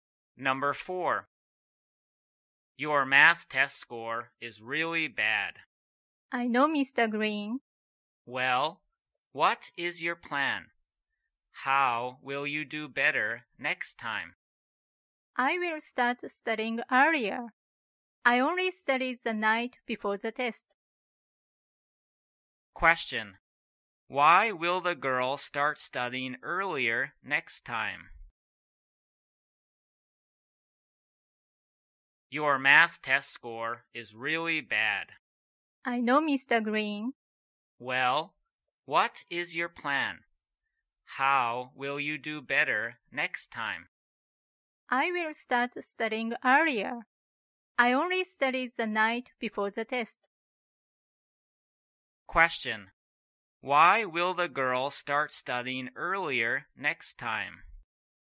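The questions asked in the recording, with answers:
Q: Why will the girl start studying earlier next time?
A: Her math test score was really bad because she only studied the night before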